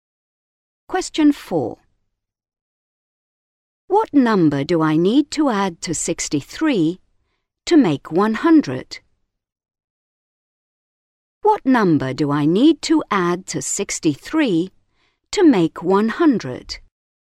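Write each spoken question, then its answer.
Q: What number do I need to add to 63 to make 100?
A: 37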